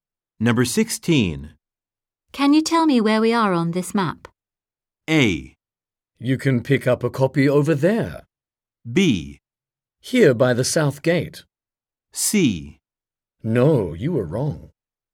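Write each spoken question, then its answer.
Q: Can you tell me where we are on this map?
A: B: Here by the south gate.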